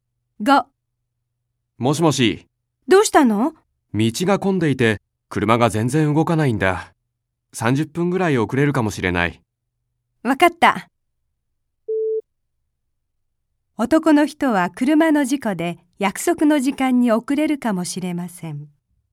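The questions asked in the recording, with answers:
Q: 男の人は車の事故で約束の時間に遅れるかもしれません。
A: ×(道が混んでいるから)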